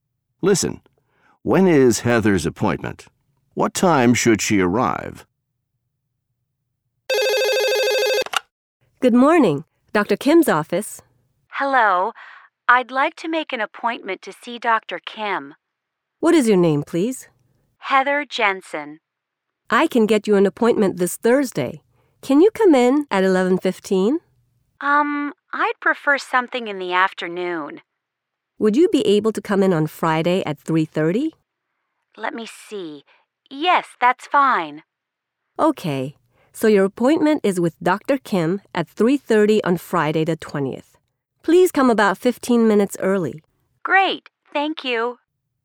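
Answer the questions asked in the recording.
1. Friday the 20th at 3:30
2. About 3:15 (15 minutes early)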